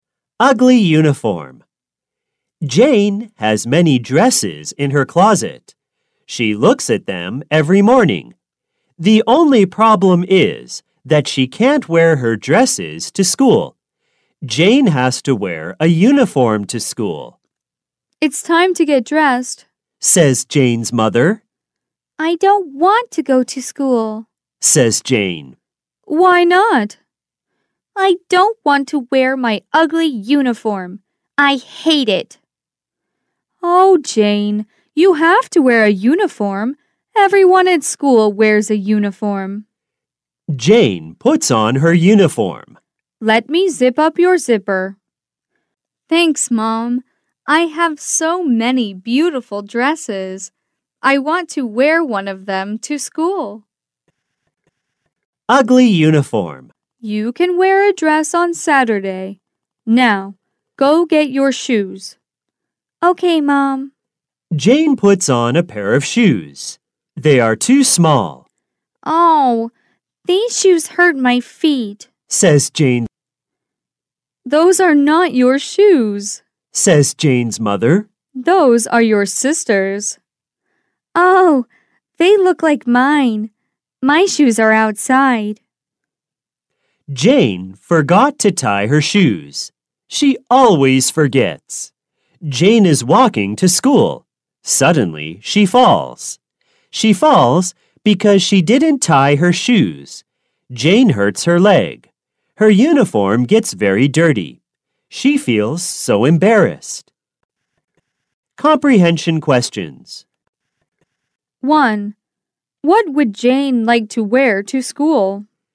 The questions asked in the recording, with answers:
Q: What would Jane like to wear to school?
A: She would like to wear dresses to school.